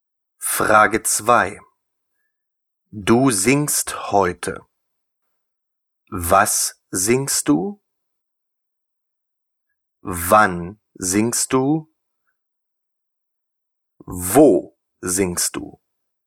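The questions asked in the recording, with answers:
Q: Du singst heute.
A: Wann singst du?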